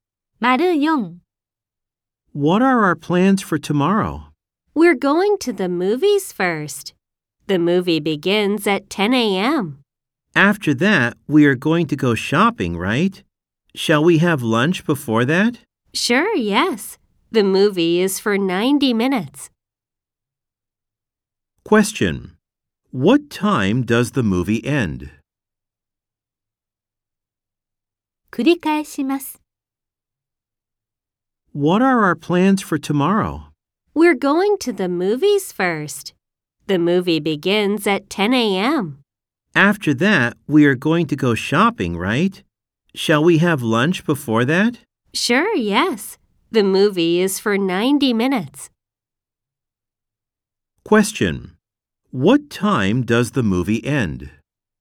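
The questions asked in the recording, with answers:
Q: What time does the movie end?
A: At 11:30 a.m.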